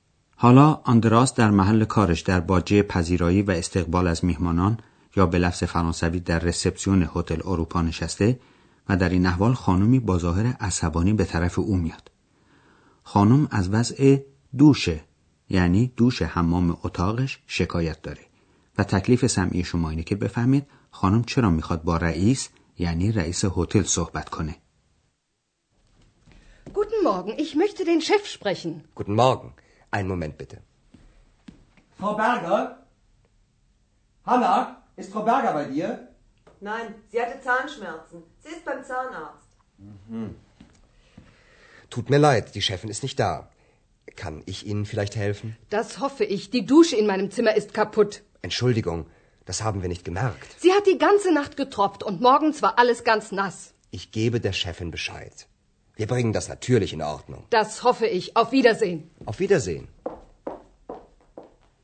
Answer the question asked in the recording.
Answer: پس خانم برای این میخواست با رئیس هتل صحبت کنه که دوش حمام اتاقش خرابه